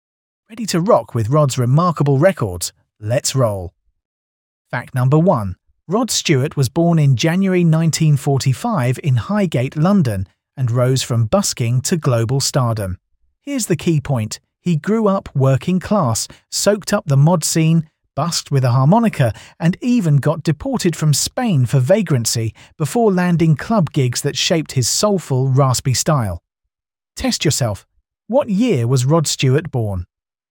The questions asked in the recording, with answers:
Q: What year was Rod Stewart born?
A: Correct answer, 1945.